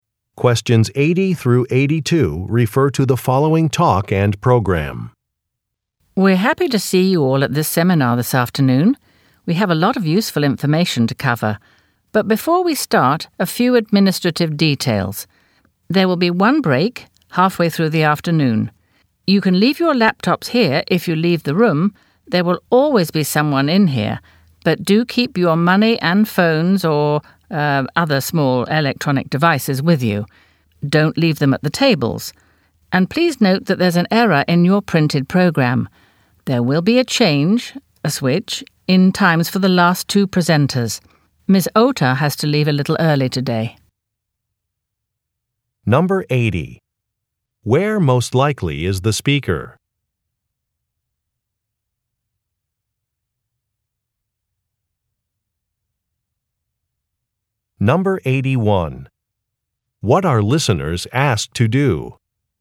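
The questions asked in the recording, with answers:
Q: Where most likely is the speaker?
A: At a seminar

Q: What are listeners asked to do?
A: Keep their money, phones and small electronic devices with them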